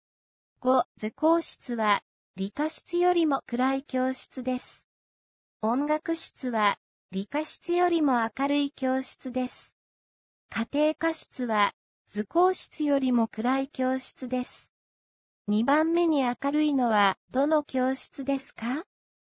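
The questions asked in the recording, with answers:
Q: 2番目に明るいのは、どの教室ですか?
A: 理科室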